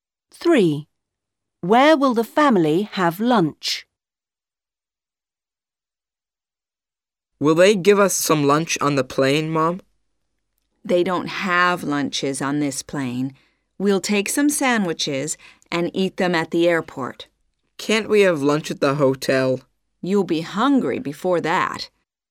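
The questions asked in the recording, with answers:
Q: Where will the family have lunch?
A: At the airport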